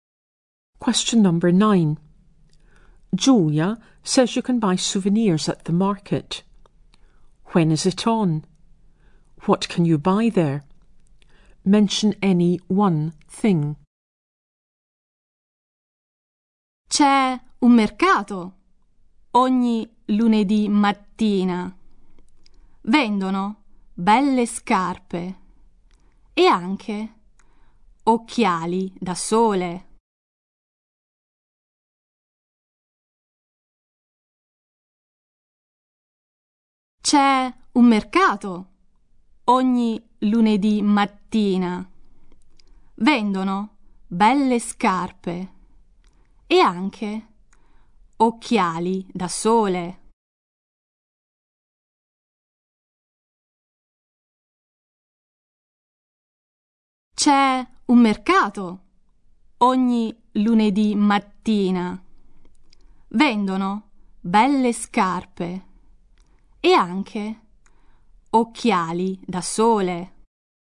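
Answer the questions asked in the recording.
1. Every Monday morning
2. Shoes or sunglasses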